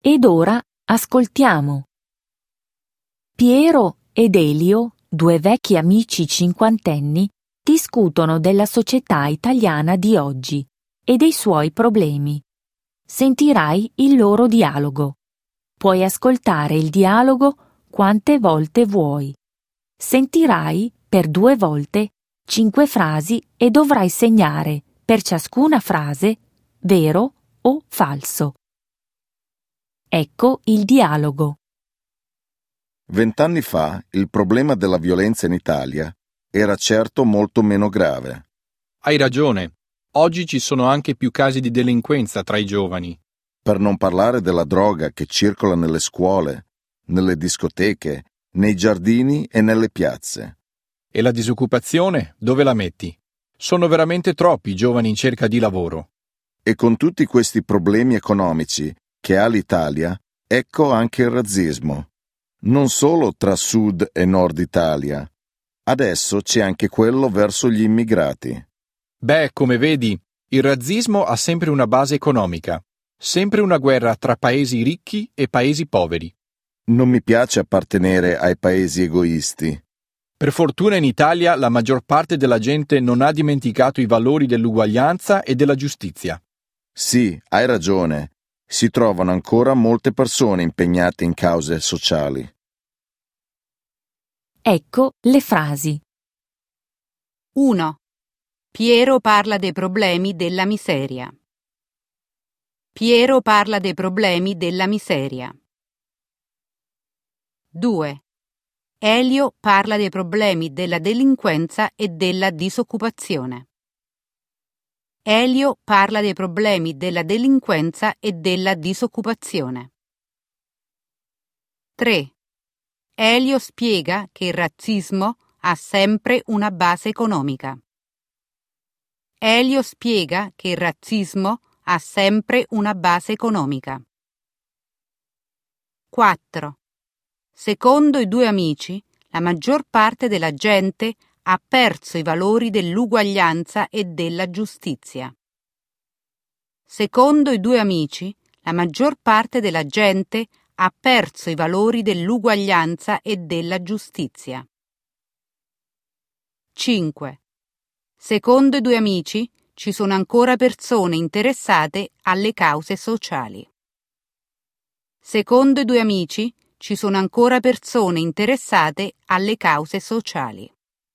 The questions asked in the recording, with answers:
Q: Piero parla dei problemi della miseria.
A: 1. Falso.

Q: Secondo i due amici, la maggior parte della gente ha perso i valori dell'uguaglianza e della giustizia.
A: 4. Falso.

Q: Secondo i due amici, ci sono ancora persone interessate alle cause sociali.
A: 5. Vero.